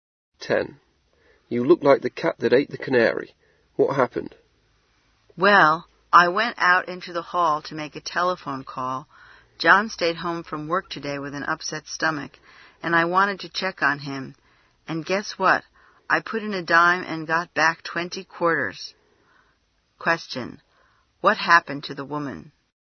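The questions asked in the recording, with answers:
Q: What happened to the woman?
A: She put a dime in a pay phone and got back 20 quarters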